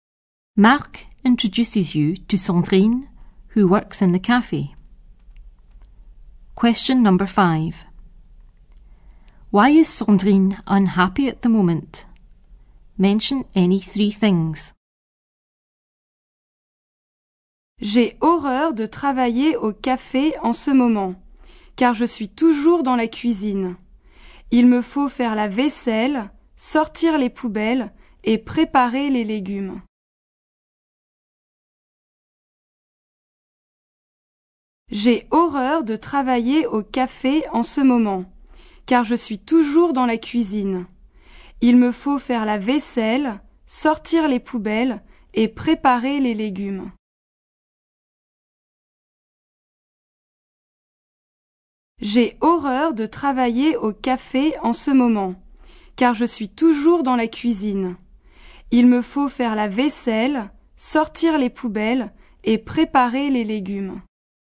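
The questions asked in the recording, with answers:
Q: Why is Sandrine unhappy at the moment?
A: Always in the kitchen; washing dishes, taking out bins, preparing vegetables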